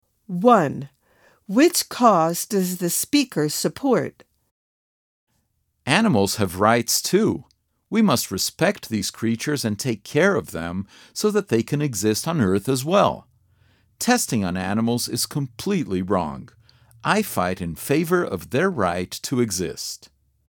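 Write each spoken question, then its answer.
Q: Which cause does the speaker support?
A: Animal rights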